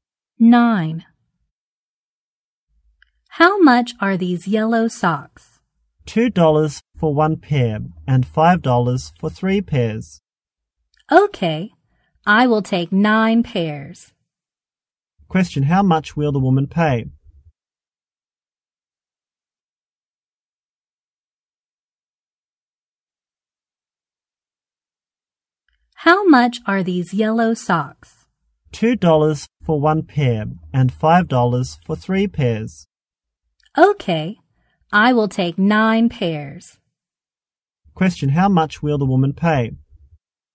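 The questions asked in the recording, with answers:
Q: Question: How much will the woman pay?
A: $15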